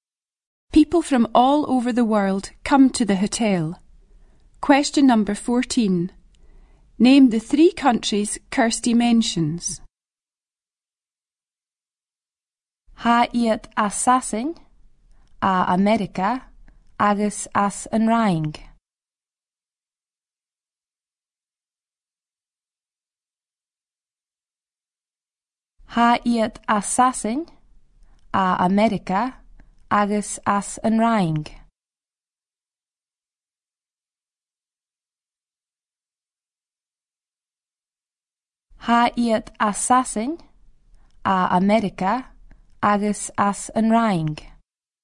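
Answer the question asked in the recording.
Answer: England, America and France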